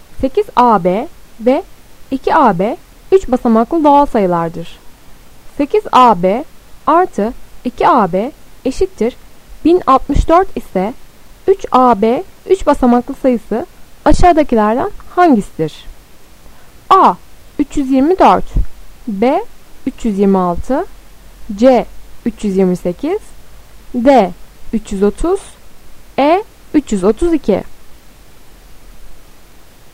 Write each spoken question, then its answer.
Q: 8AB artı 2AB eşittir 1064 ise 3AB 3 basamaklı sayısı aşağıdakilerden hangisidir?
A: Doğru cevap E 332.